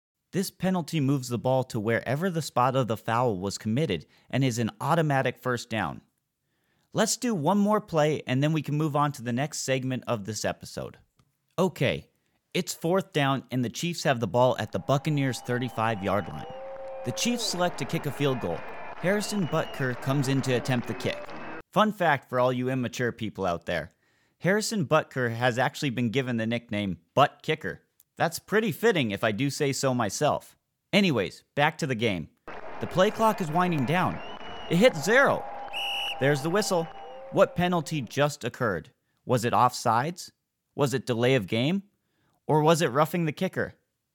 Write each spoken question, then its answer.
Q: What penalty just occurred?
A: You are 100% correct if you chose delay of game.